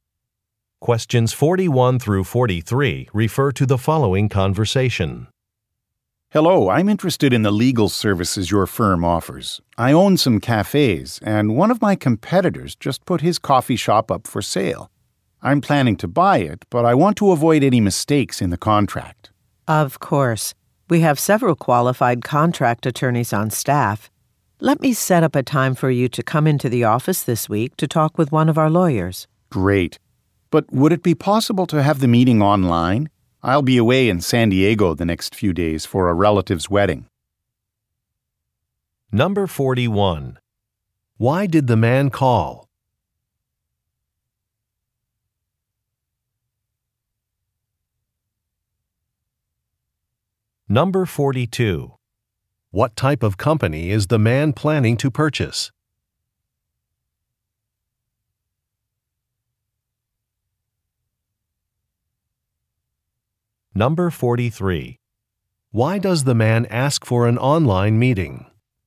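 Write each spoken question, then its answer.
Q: Why did the man call?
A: To get legal help with a purchase contract

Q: What type of company is the man planning to purchase?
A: A coffee shop

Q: Why does the man ask for an online meeting?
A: He will be away in San Diego for a wedding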